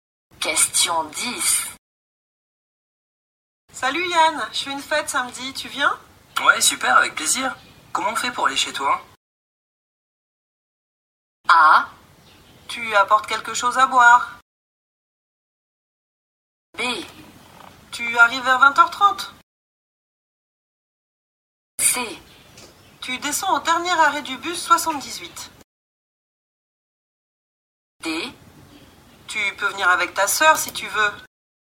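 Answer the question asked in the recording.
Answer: C: Tu descends au dernier arrêt du bus 78.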